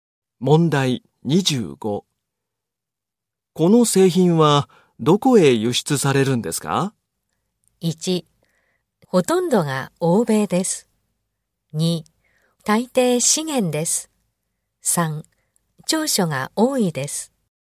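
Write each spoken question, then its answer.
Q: この製品は、どこへ輸出されるんですか?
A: 2: ほとんどが欧米です。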